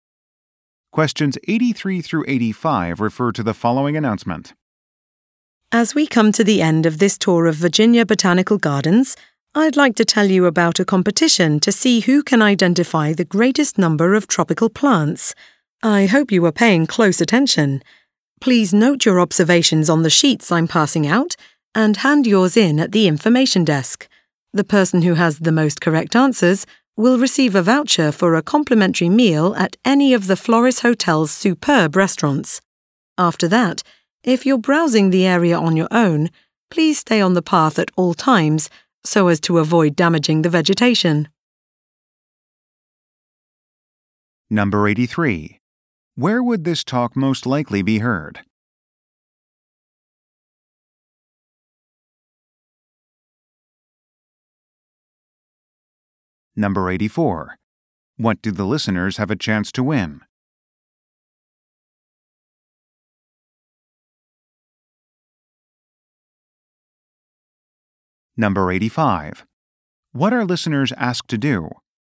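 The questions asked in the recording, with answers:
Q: Where would this talk most likely be heard?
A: At a botanical garden

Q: What do the listeners have a chance to win?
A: A voucher for a free meal at a hotel restaurant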